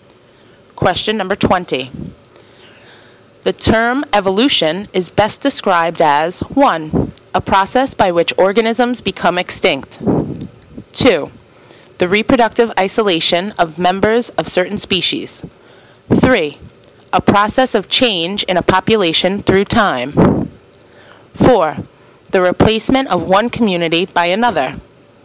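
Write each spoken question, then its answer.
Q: The term evolution is best described as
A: 3: A process of change in a population through time.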